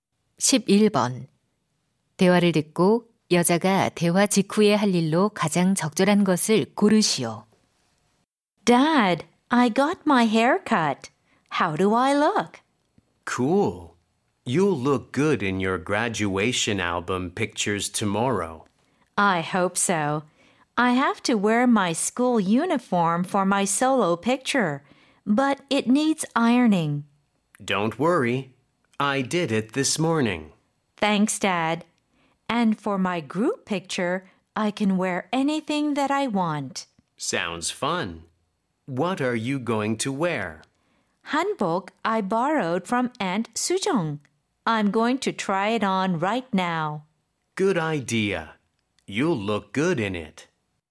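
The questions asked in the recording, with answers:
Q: 대화를 듣고 여자가 대화 직후에 할 일로 가장 적절한 것을 고르시오.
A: 한복 입어 보기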